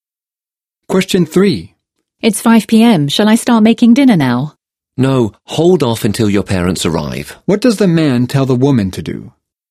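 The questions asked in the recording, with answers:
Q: What does the man tell the woman to do?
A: Wait until her parents arrive to make dinner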